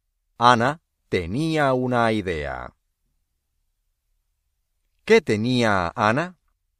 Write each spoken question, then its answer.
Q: ¿Qué tenía Ana?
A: Una idea.